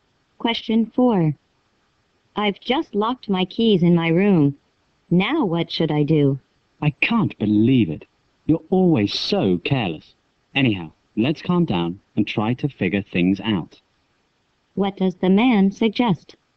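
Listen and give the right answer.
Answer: Calm down and figure out what to do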